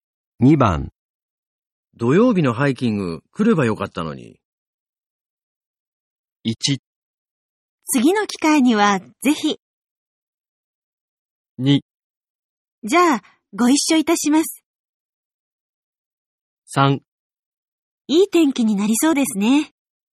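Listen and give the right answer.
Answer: 1: 次の機会にはぜひ。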